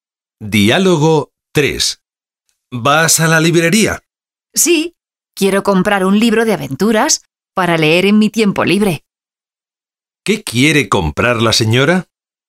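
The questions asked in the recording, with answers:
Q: ¿Qué quiere comprar la señora?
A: Un libro de aventuras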